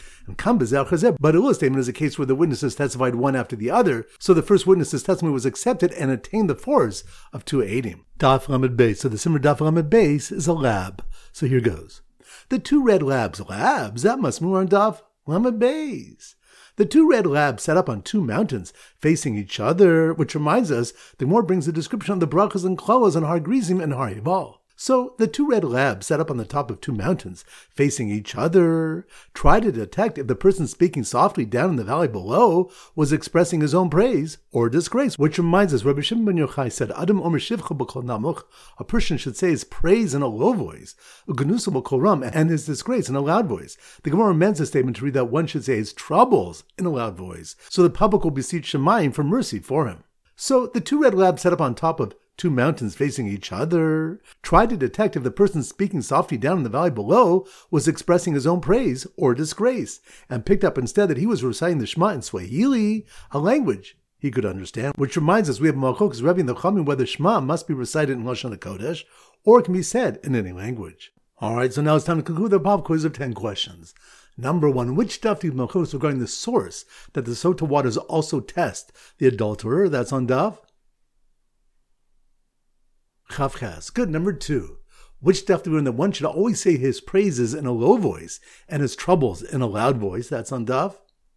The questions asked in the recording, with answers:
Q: Which daf do we learn that one should always say his praises in a low voice and his troubles in a loud voice?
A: Lamed Beis.